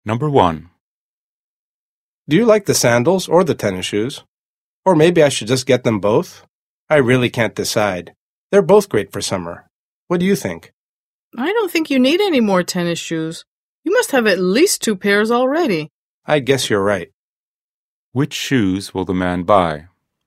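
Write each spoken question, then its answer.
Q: Which shoes will the man buy?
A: The sandals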